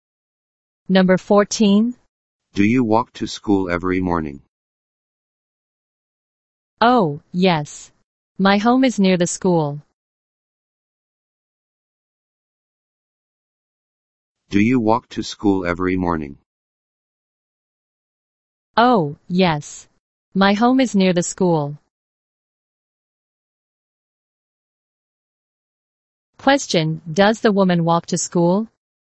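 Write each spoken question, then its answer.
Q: Question, does the woman walk to school?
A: Yes, her home is near the school.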